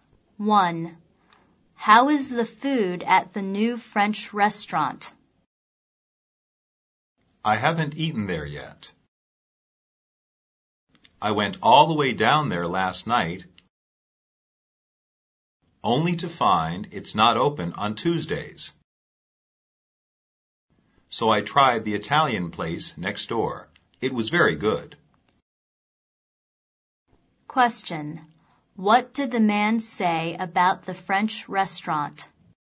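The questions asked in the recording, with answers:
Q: What did the man say about the French restaurant?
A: It isn't open on Tuesdays, so he hasn't eaten there yet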